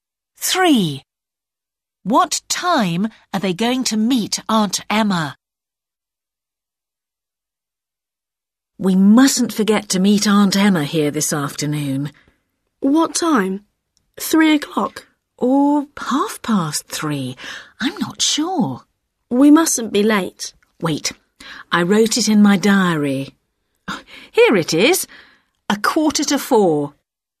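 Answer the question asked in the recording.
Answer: 4:15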